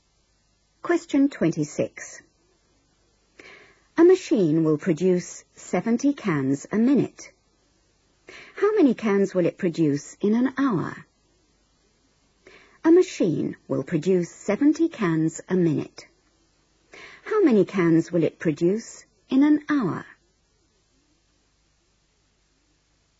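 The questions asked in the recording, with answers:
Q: How many cans will it produce in an hour?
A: 4200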